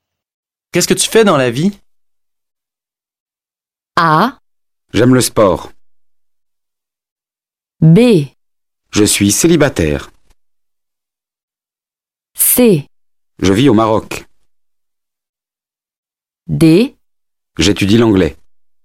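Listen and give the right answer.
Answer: D: J'étudie l'anglais.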